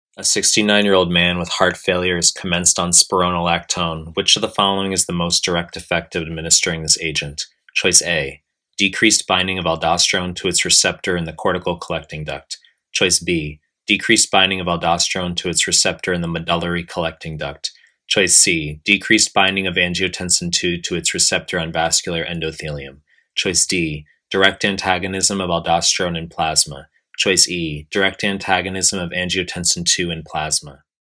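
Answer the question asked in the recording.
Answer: A: decreased binding of aldosterone to its receptor in the cortical collecting duct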